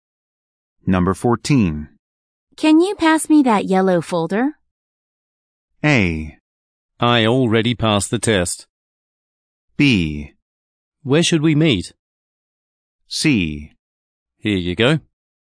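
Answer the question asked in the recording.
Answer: C: Here you go.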